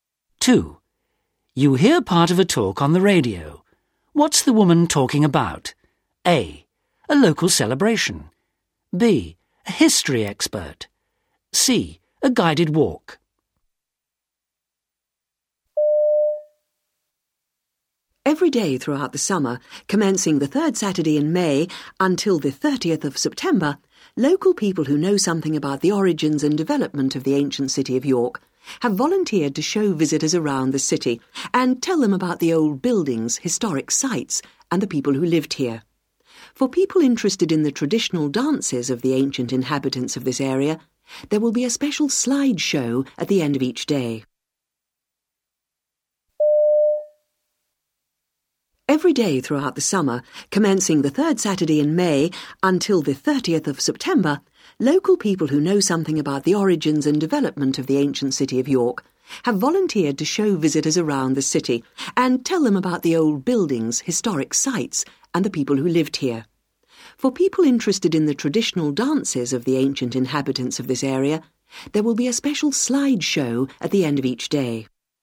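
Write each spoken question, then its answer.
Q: What's the woman talking about?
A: C: A guided walk.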